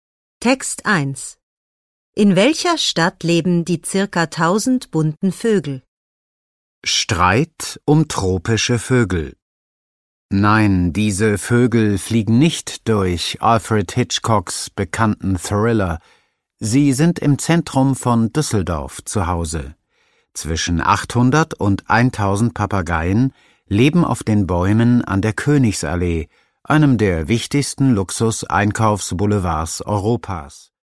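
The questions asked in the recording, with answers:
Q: In welcher Stadt leben die circa 1000 bunten Vögel?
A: In Düsseldorf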